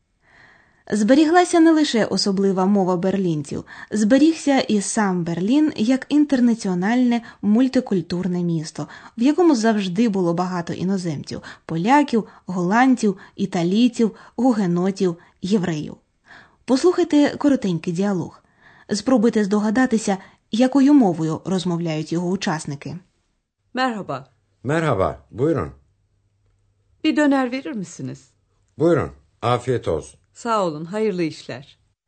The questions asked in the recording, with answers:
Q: Спробуйте здогадатися, якою мовою розмовляють його учасники.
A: Це була турецька.